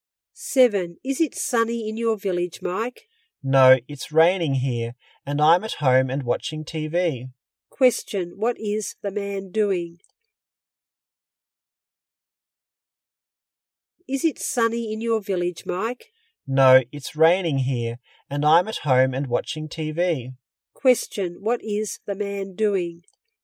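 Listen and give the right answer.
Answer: Watching TV at home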